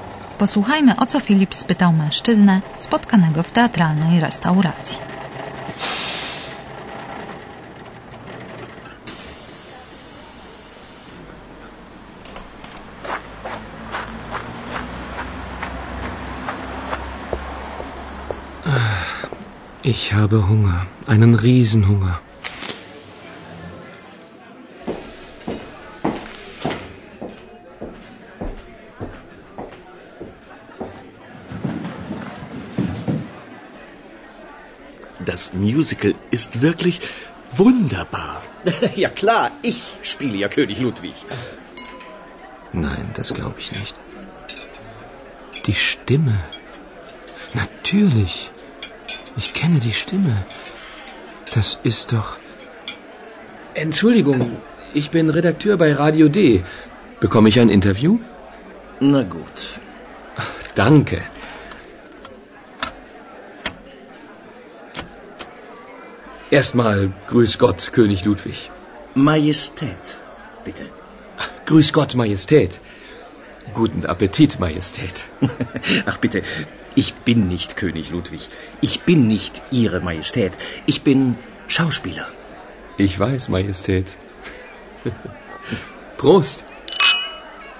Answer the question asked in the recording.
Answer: Filip przedstawił się mężczyźnie jako redaktor Radia D i poprosił go o wywiad.